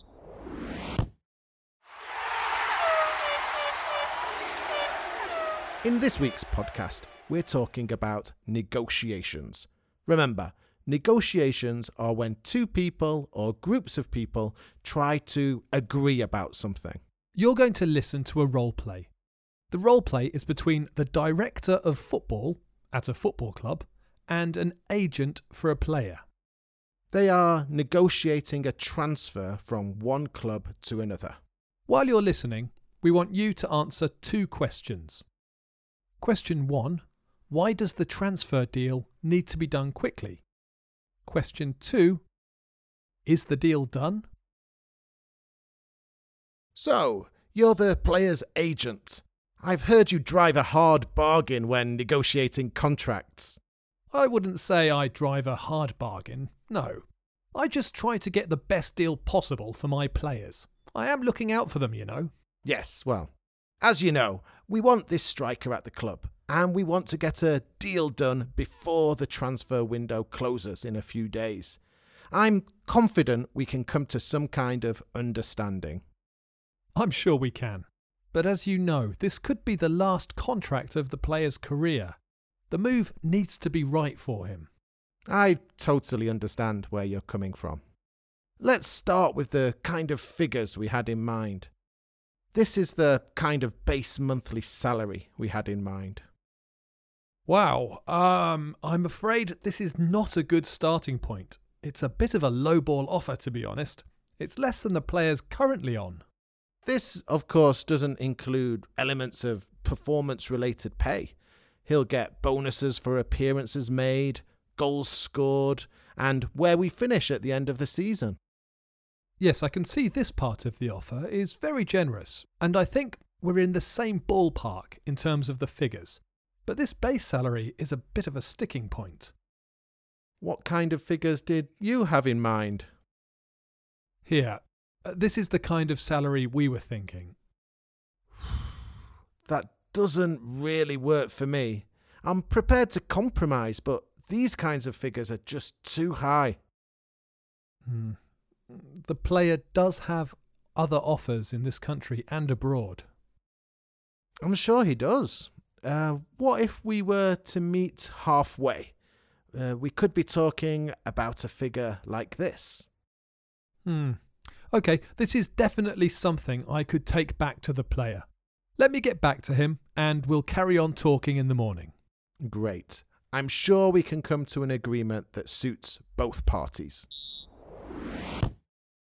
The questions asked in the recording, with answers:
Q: why does the transfer deal need to be done quickly?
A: The answer is that the transfer window closes in a few days, and clubs can only buy players when the transfer window is open.

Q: is the deal done?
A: The answer is no, but negotiations have progressed, and they will continue the following day.